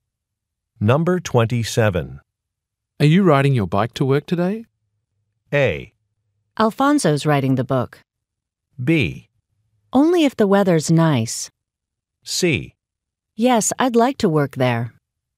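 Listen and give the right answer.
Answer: B: Only if the weather's nice.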